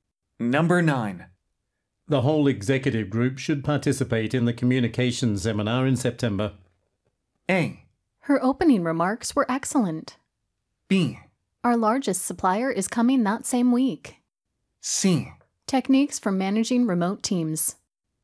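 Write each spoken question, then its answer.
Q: The whole executive group should participate in the communications seminar in September.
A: B: Our largest supplier is coming that same week.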